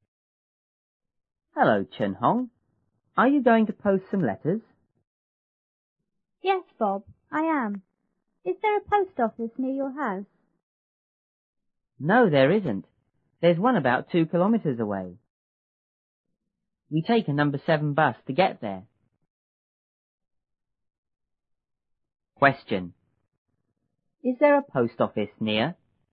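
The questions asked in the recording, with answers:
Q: Is there a post office near?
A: No, there isn't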